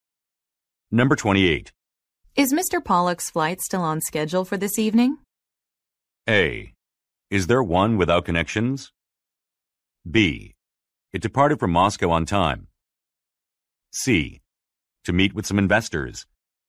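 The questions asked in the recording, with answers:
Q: Is Mr. Pollock's flight still on schedule for this evening?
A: B: It departed from Moscow on time.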